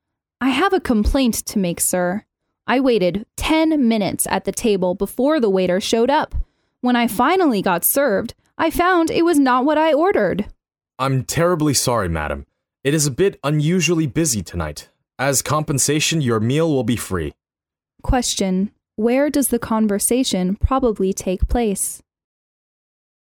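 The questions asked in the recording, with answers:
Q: Where does the conversation probably take place?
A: In a restaurant.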